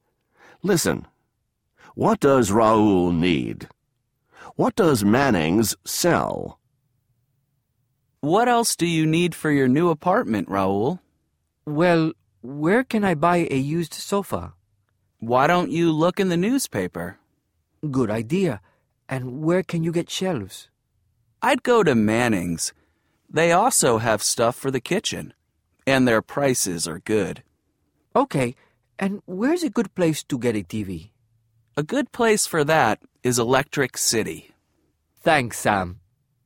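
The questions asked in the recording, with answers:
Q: What does Raoul need?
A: A used sofa, shelves, and a TV

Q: What does Manning's sell?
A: Shelves and stuff for the kitchen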